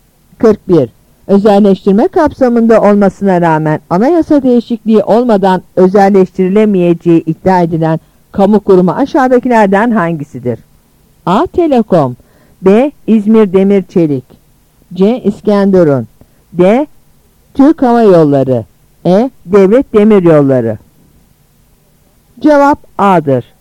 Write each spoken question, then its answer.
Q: Özelleştirme kapsamında olmasına rağmen anayasa değişikliği olmadan özelleştirilemeyeceği iddia edilen kamu kurumu aşağıdakilerden hangisidir?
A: Cevap A'dır.